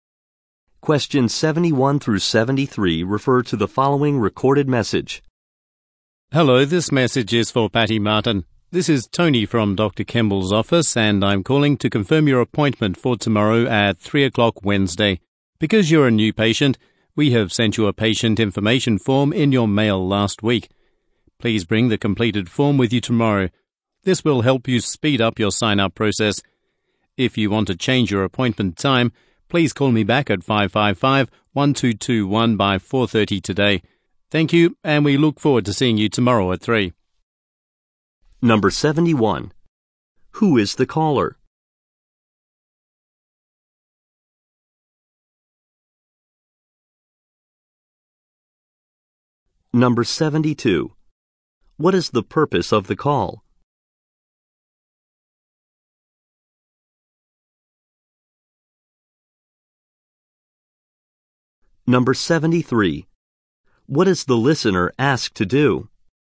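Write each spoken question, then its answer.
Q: Who is the caller?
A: Tony from Dr. Kemble's office.

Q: What is the purpose of the call?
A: To confirm an appointment.

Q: What is the listener asked to do?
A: Bring the completed patient information form.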